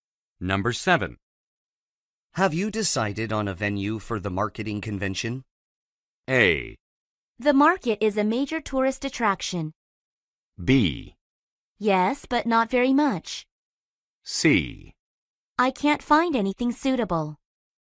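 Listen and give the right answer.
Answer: C: I can't find anything suitable.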